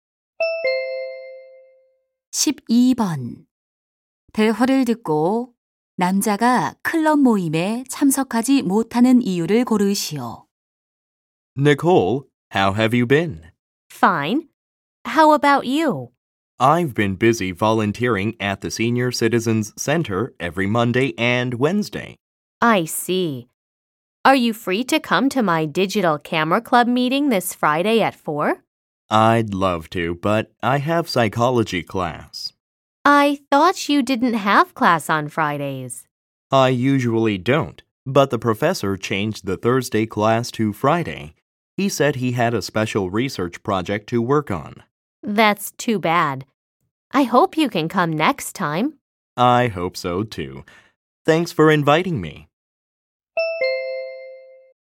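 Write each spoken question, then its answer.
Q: 대화를 듣고 남자가 클럽 모임에 참석하지 못하는 이유를 고르시오.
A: 심리학 수업이 금요일로 바뀌어서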